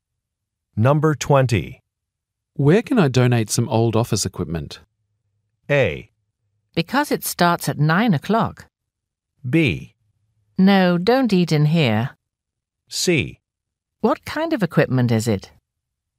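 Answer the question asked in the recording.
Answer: C: What kind of equipment is it?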